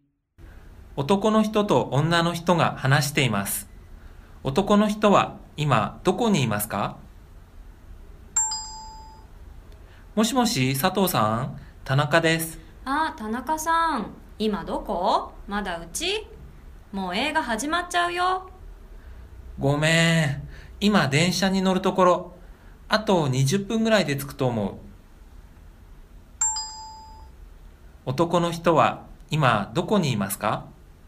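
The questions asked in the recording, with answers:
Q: 男の人は今どこにいますか?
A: 駅(これから電車に乗るところ)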